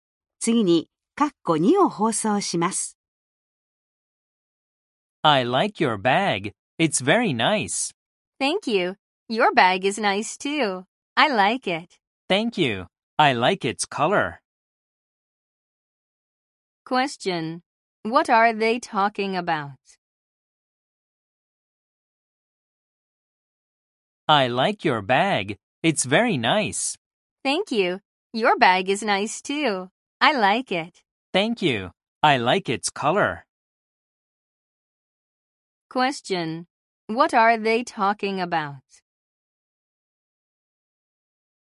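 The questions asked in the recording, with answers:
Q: Question. What are they talking about?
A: Their bags.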